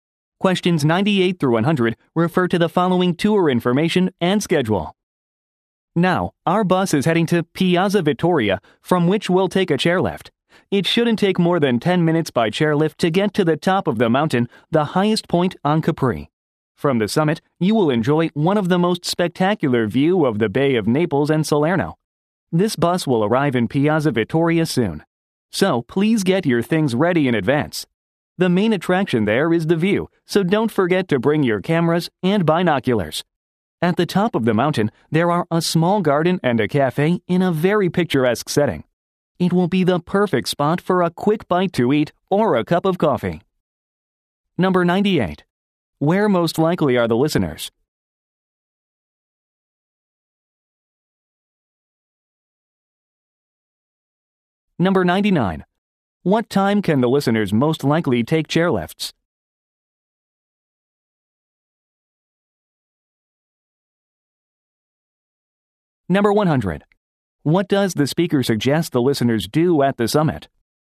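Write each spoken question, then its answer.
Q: Where most likely are the listeners?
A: On a tour bus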